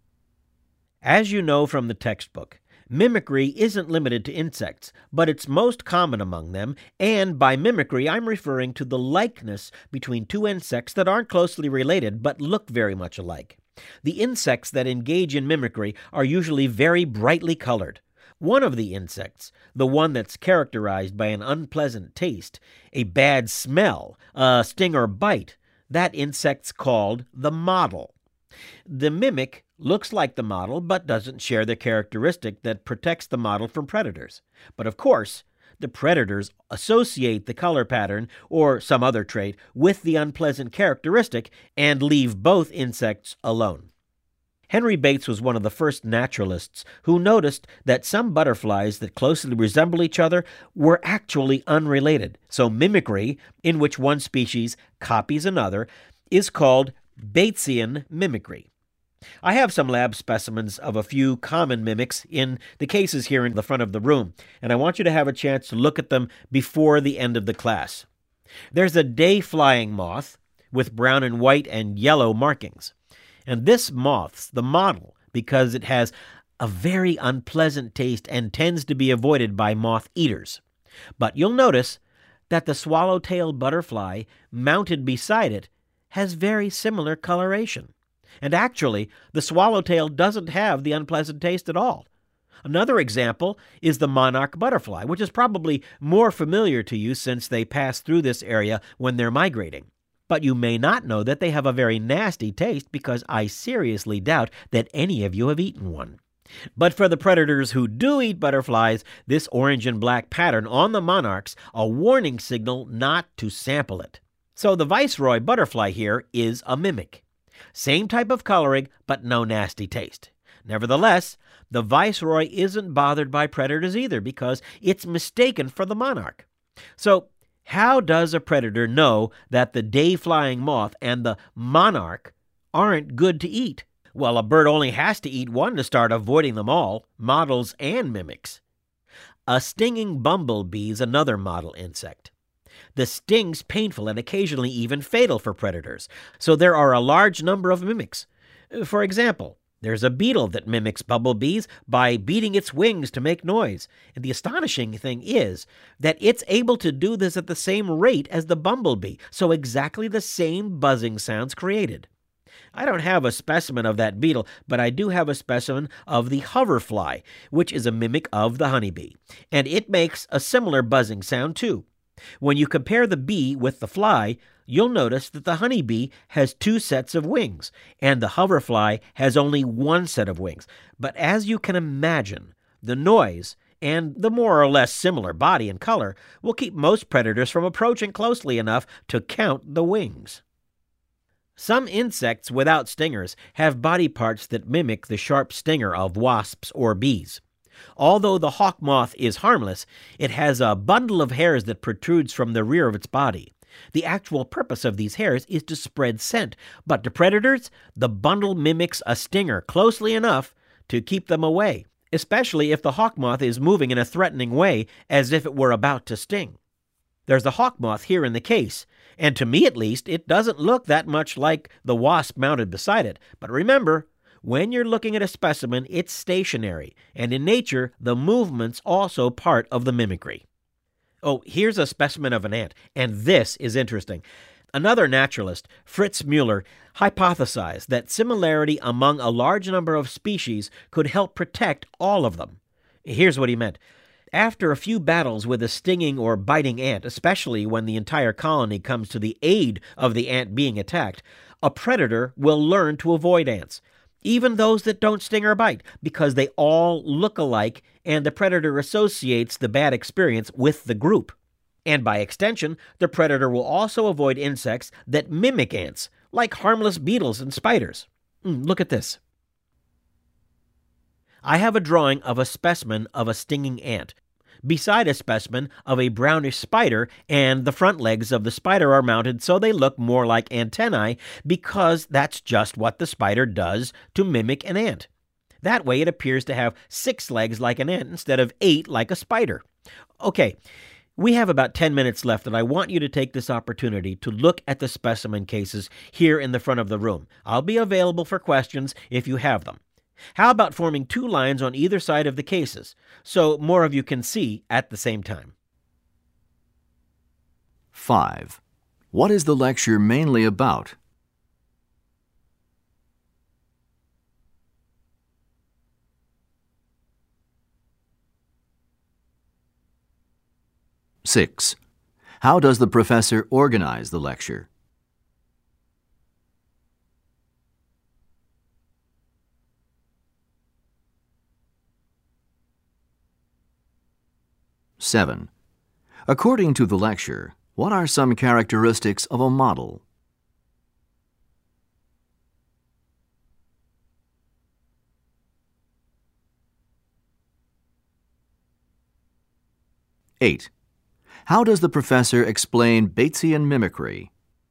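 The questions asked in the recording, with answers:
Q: What is the lecture mainly about?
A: Mimicry among insects (models and mimics)

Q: According to the lecture, what are some characteristics of a model?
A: An unpleasant taste, a bad smell, or a sting or bite; often brightly colored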